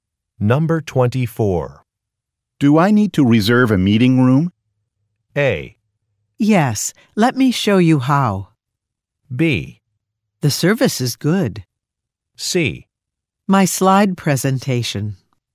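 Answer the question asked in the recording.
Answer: A: Yes, let me show you how.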